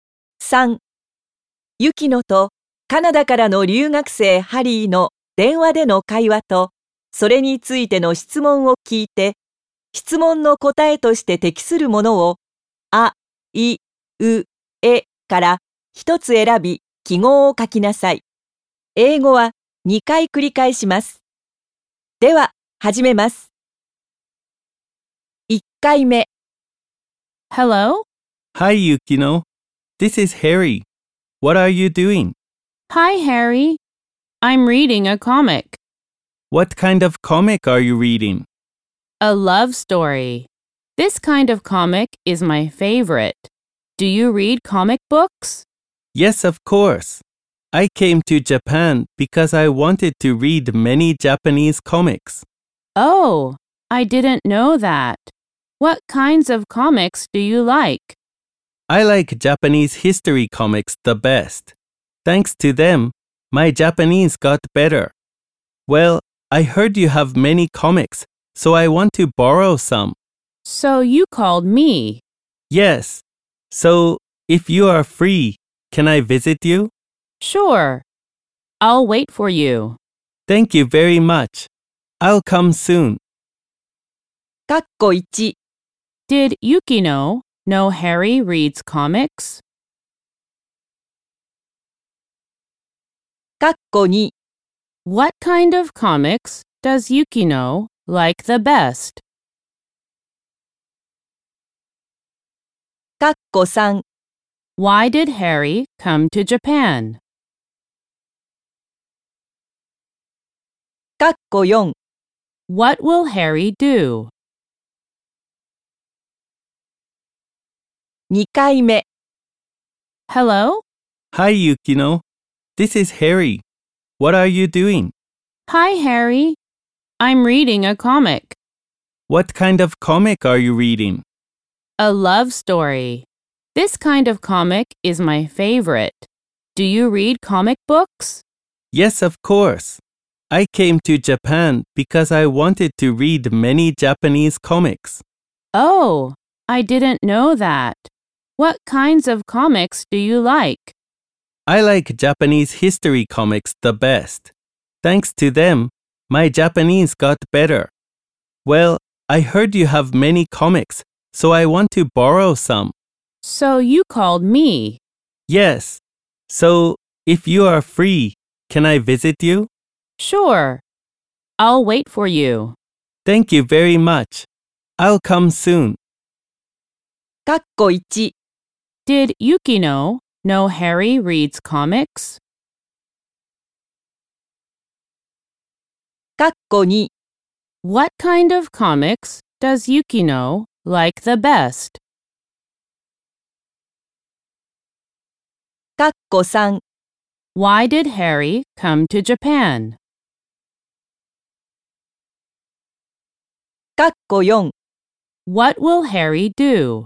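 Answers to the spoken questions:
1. No, she didn't.
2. Love stories
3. Because he wanted to read many Japanese comics
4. Visit Yukino to borrow some comics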